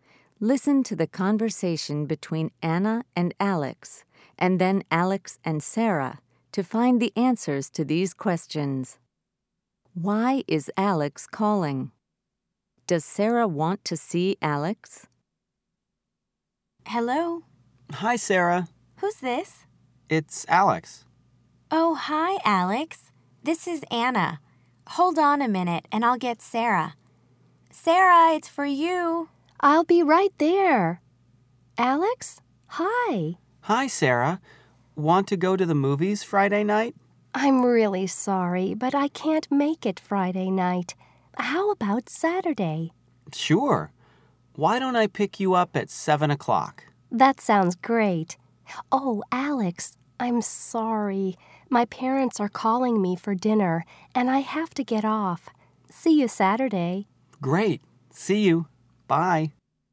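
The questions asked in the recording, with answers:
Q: Why is Alex calling?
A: To ask Sarah to go to the movies

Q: Does Sarah want to see Alex?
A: Yes, on Saturday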